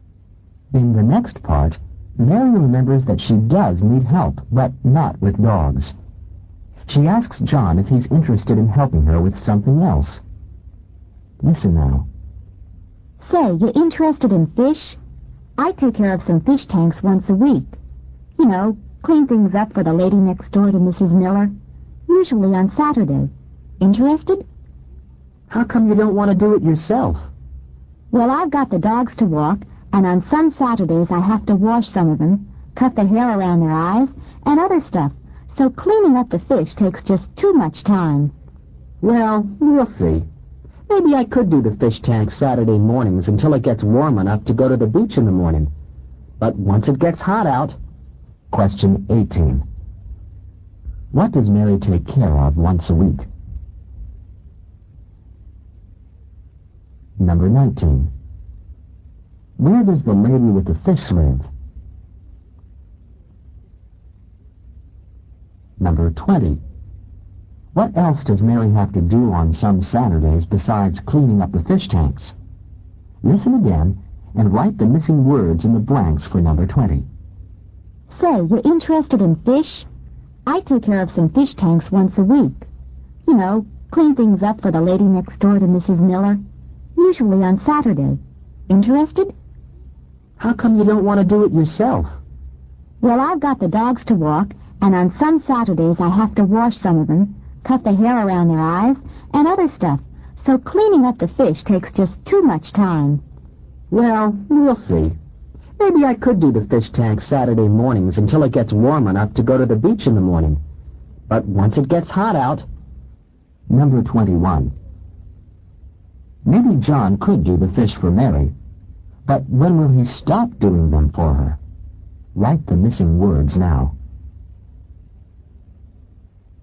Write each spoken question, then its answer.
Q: What does Mary take care of once a week?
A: Number 18, some fish tanks.

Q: Where does the lady with the fish live?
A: Number 19, she lives next door.

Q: What else does Mary have to do on some Saturdays besides cleaning up the fish tanks?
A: Number 20, she walks the dogs.

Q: Maybe John could do the fish for Mary, but when will he stop doing them for her?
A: Number 21, when it gets warm enough, E-N-O-U-G-H, to go to the beach